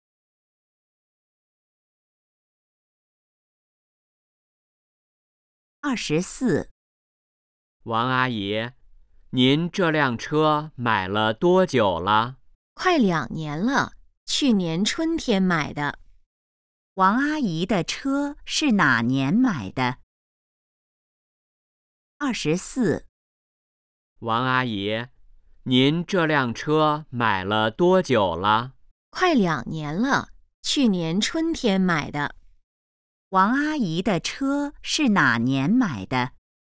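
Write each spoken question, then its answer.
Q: 王阿姨的车是哪年买的?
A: 去年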